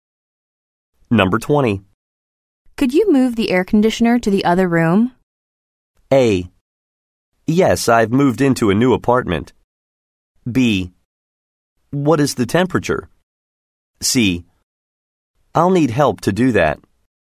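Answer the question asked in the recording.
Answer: C: I'll need help to do that.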